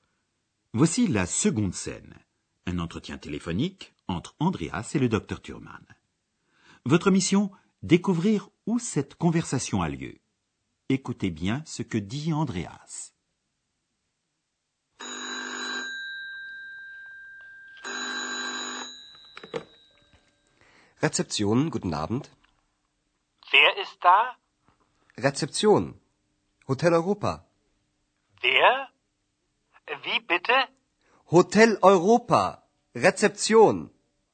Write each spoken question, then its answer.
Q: Votre mission, découvrir où cette conversation a lieu.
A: Notre cours d'allemand se déroule donc à l'hôtel de l'Europe, où Andreas travaille comme réceptionniste ou portier.